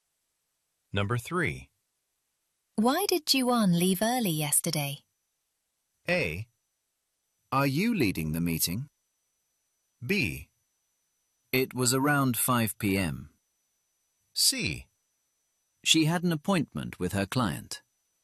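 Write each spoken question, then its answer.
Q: Why did Ju-on leave early yesterday?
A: C: She had an appointment with her client.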